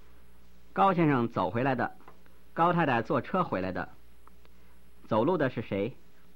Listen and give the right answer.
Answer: 走路的是高先生。